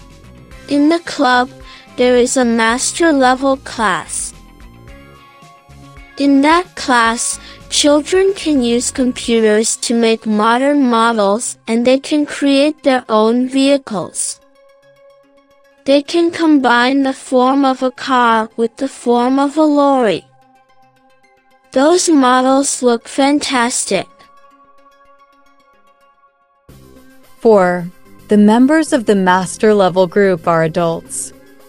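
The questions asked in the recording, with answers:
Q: The members of the master level group are adults.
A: False, they are children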